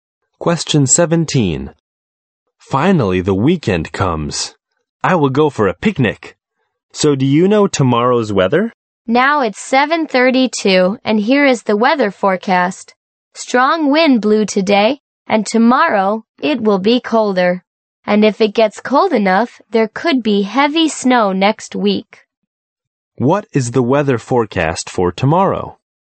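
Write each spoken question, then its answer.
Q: What is the weather forecast for tomorrow?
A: It will be colder.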